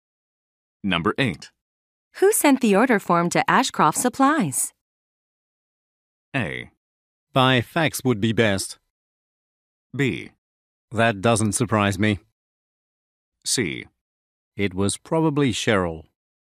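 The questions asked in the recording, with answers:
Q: Who sent the order form to Ashcroft Supplies?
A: C: It was probably Cheryl.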